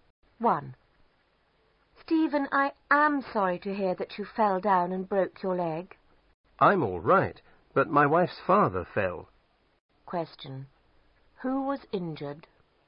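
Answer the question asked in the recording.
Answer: The man's wife's father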